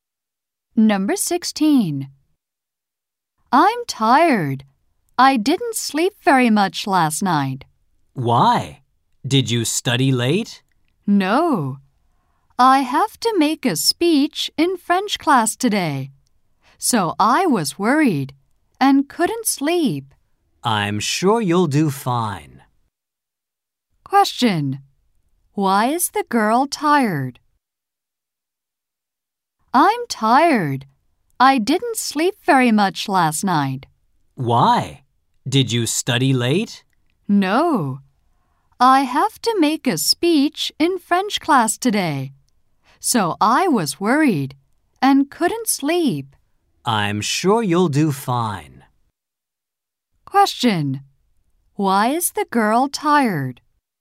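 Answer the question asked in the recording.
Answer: She was worried about her speech in French class and couldn't sleep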